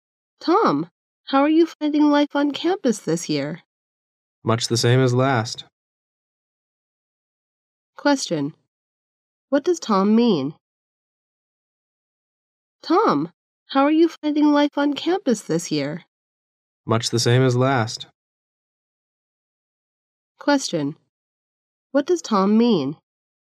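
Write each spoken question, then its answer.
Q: What does Tom mean?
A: His campus life is about the same as last year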